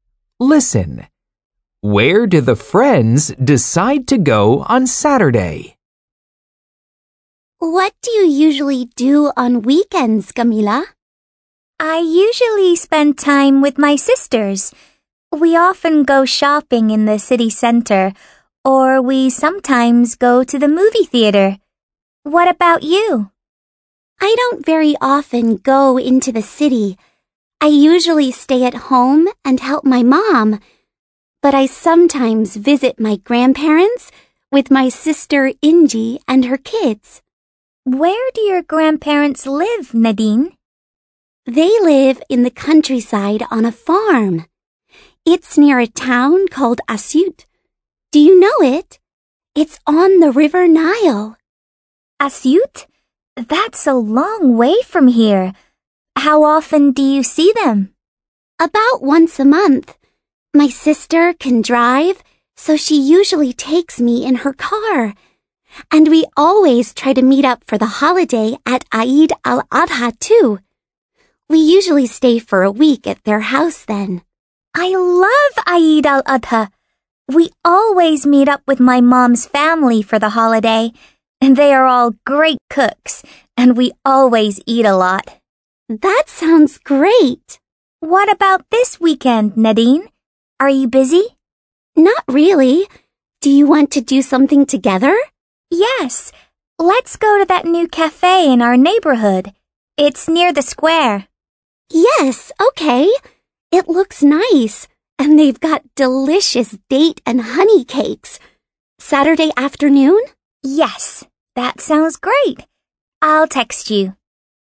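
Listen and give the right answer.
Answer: To the new cafe in their neighborhood, near the square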